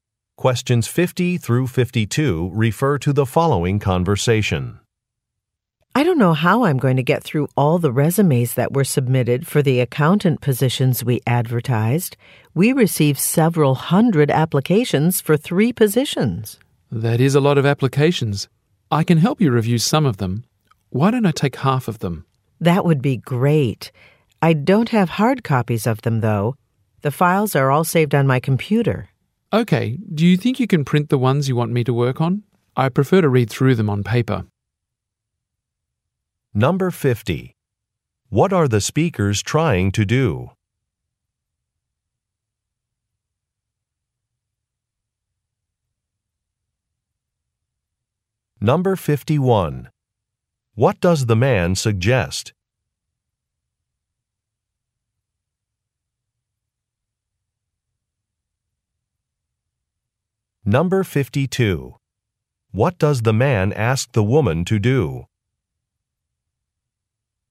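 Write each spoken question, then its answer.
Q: What are the speakers trying to do?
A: Review resumes to hire accountants

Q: What does the man suggest?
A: Taking half of the applications to review

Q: What does the man ask the woman to do?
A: Print the resumes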